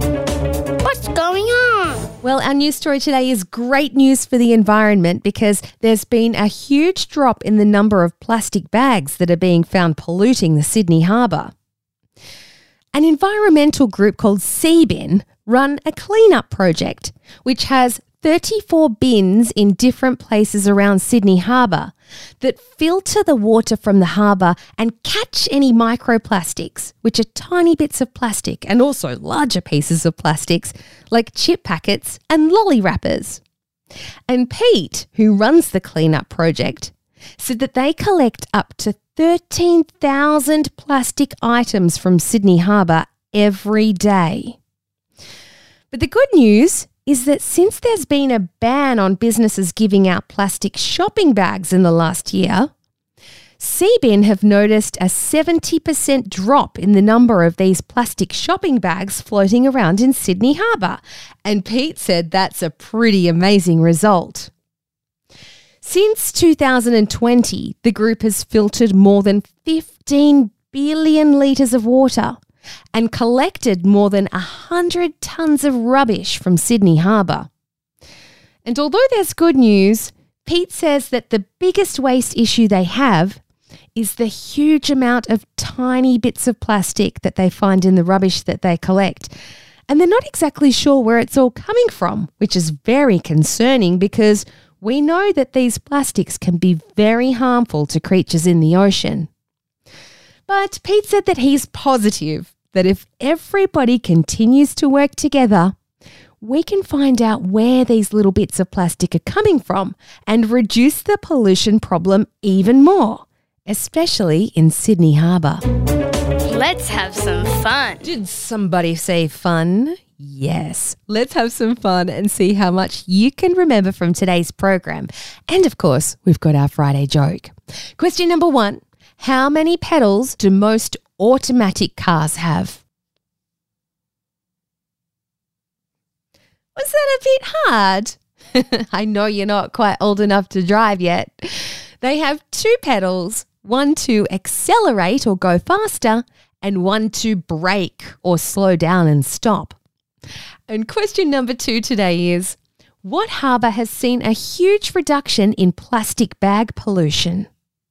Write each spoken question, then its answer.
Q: what harbour has seen a huge reduction in plastic bag pollution?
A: Sydney Harbour